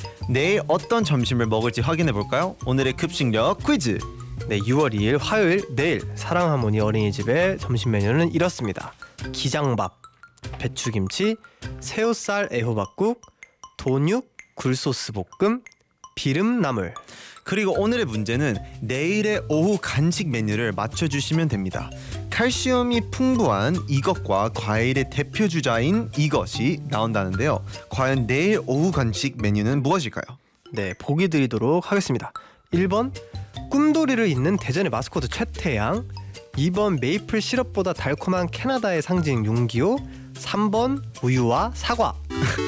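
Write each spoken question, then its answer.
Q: 과연 내일 오후 간식 메뉴는 무엇일까요?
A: 3: 우유와 사과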